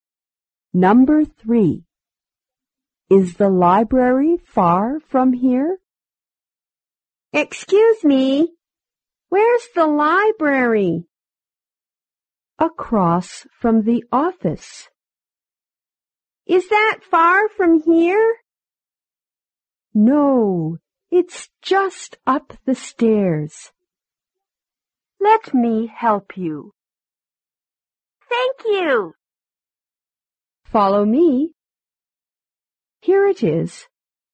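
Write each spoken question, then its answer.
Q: Is the library far from here?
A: No, it's just up the stairs.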